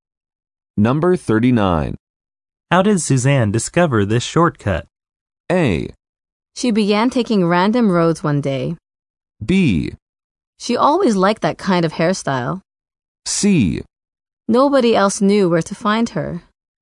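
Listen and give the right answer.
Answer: A: She began taking random roads one day.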